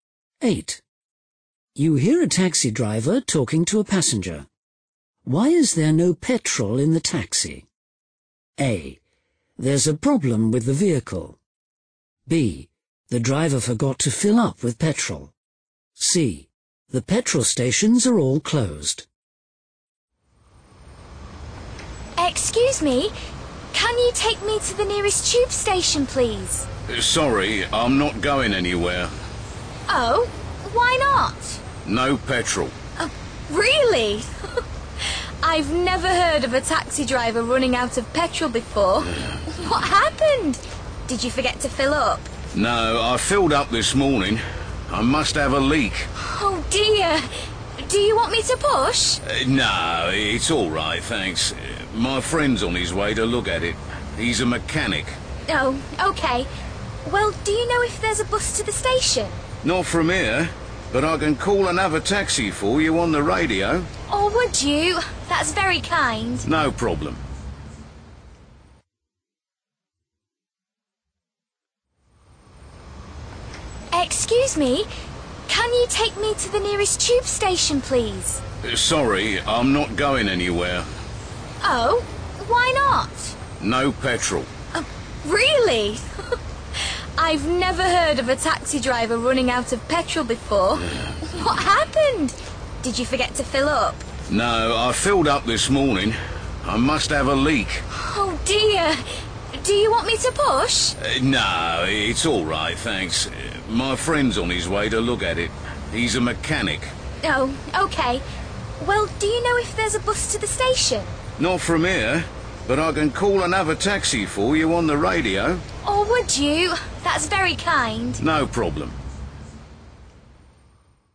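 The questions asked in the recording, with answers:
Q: Why is there no petrol in the taxi?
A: A: There's a problem with the vehicle.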